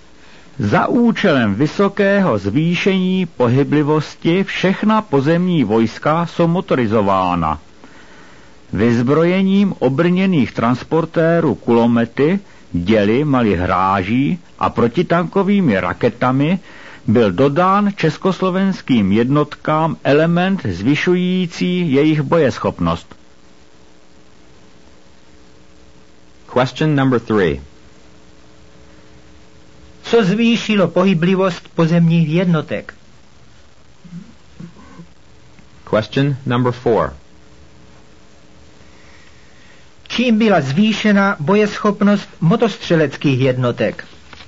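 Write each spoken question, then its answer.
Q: Co zvýšilo pohyblivost pozemních jednotek?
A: Motorizace všech pozemních vojsk

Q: Čím byla zvýšena bojeschopnost motostřeleckých jednotek?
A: Vyzbrojením obrněných transportérů kulomety, děly a protitankovými raketami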